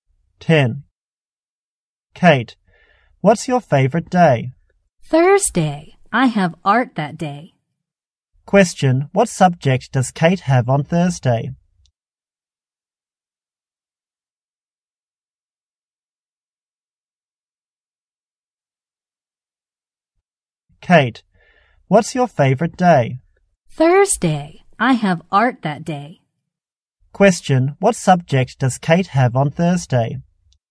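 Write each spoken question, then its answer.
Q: Question, what subject does Kate have on Thursday?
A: Art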